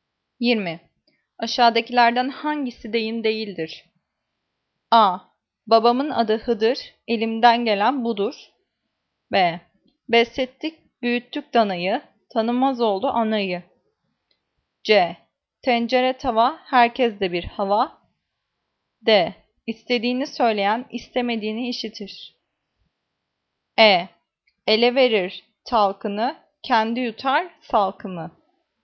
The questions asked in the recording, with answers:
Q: Aşağıdakilerden hangisi deyim değildir?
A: Cevap D. İstediğini söyleyen, istemediğini işitir.